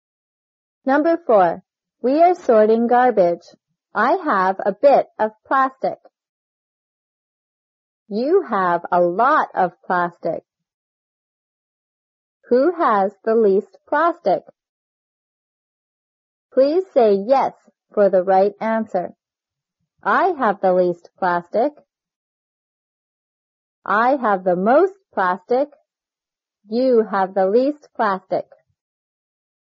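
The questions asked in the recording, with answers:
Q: Who has the least plastic?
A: I have the least plastic.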